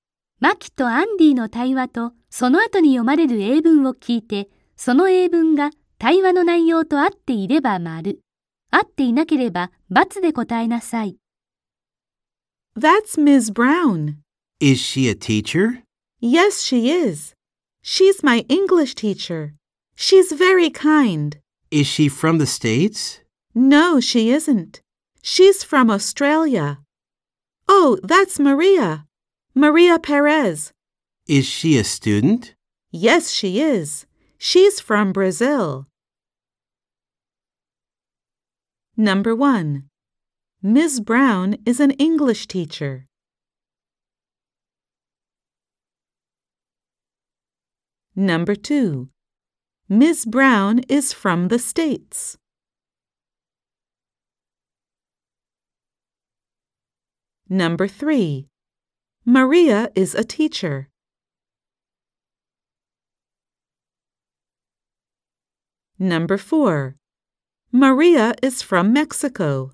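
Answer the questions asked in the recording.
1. ○ (true)
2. × (false)
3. × (false)
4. × (false)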